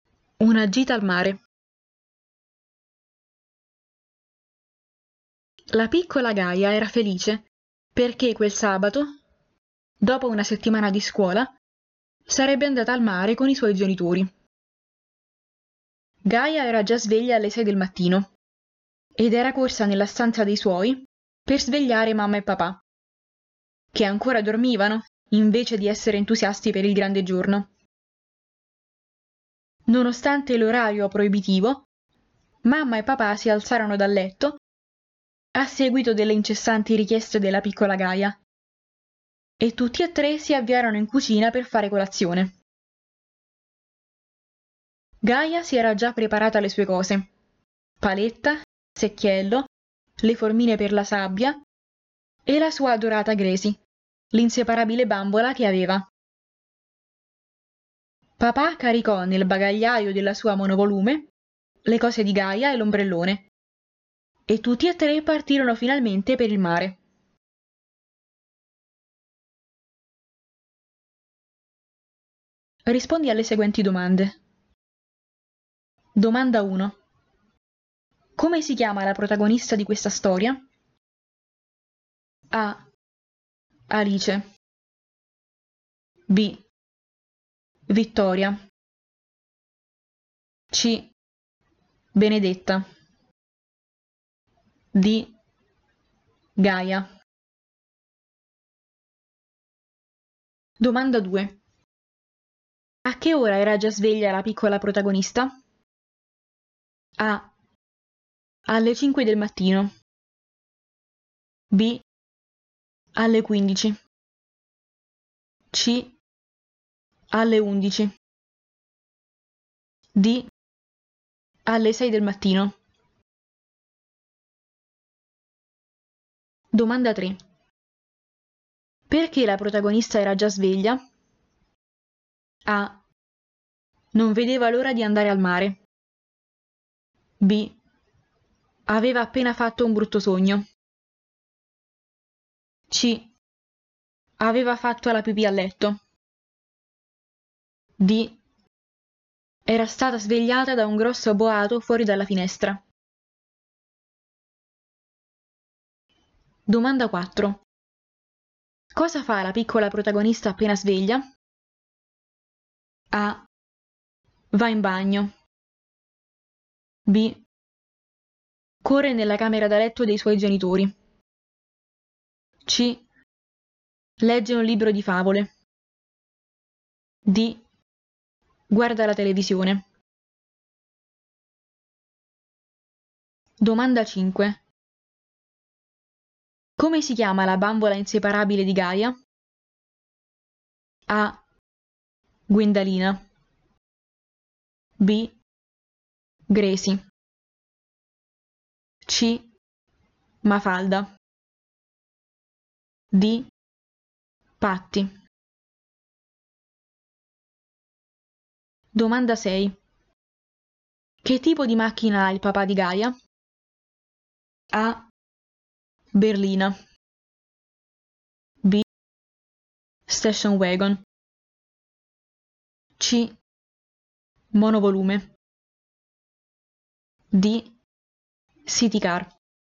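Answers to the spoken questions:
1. D: Gaia
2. D: Alle 6 del mattino
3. A: Non vedeva l'ora di andare al mare
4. B: Corre nella camera da letto dei suoi genitori
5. B: Gracie
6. C: Monovolume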